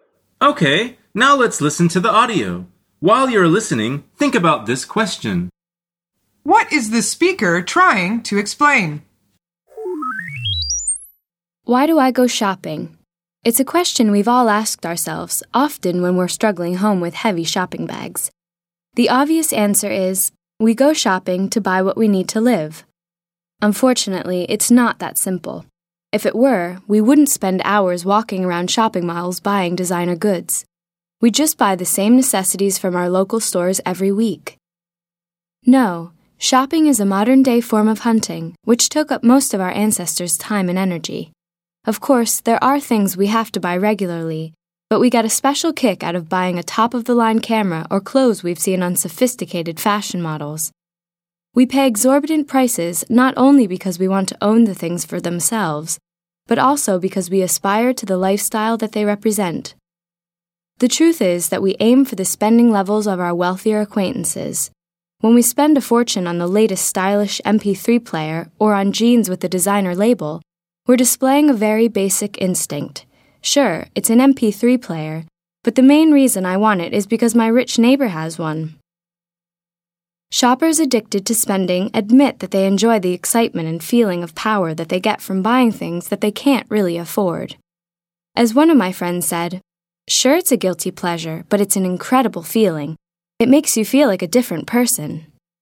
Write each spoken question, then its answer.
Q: What is the speaker trying to explain?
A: The answer is why people spend so much time and money on shopping.